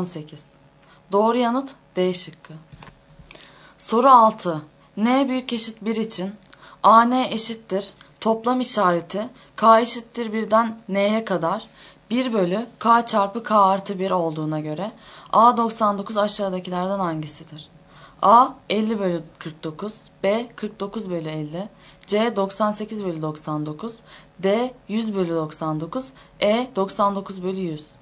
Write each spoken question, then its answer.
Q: N büyük eşit 1 için AN eşittir toplam işareti K eşittir 1'den N'ye kadar 1 bölü K çarpı K artı 1 olduğuna göre A 99 aşağıdakilerden hangisidir?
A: Doğru yanıt E şıkkı.